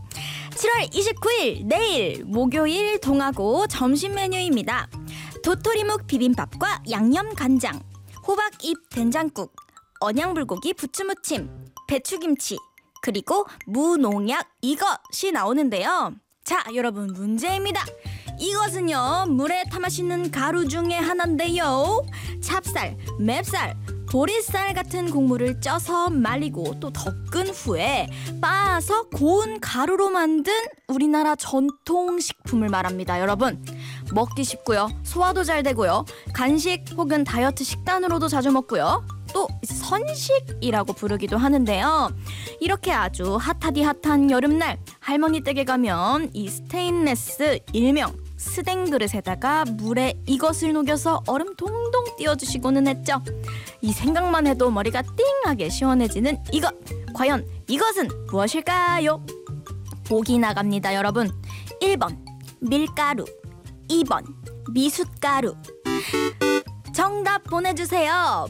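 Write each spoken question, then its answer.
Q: 과연 이것은 무엇일까요?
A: 2번: 미숫가루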